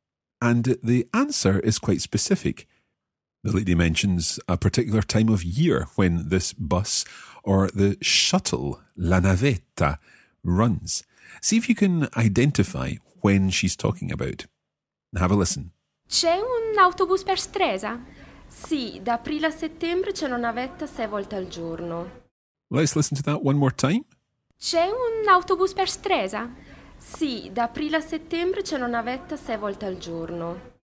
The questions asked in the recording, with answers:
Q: See if you can identify when she's talking about.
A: What she says is, da aprile a settembre, from April to September